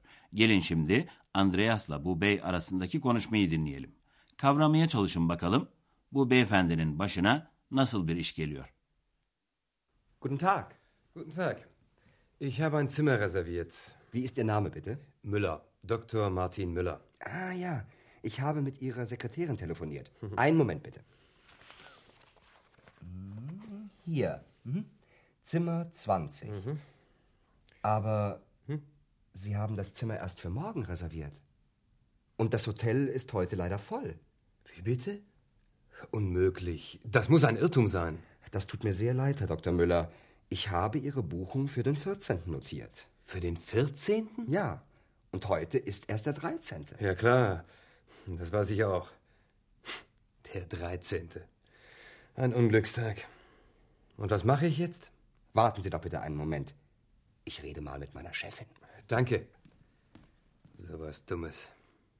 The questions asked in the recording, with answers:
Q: Kavramaya çalışın bakalım bu beyefendinin başına nasıl bir iş geliyor.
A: Düşünsenize otel Avrupa'da kendisine bir oda ayırtmış ama ne yazık ki tarihi yanlış bildirmiş.